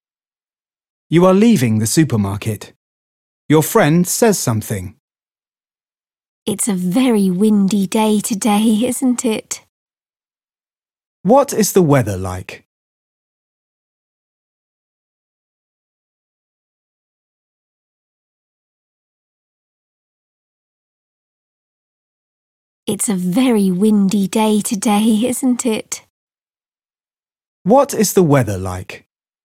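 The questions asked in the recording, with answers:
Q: What is the weather like?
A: very windy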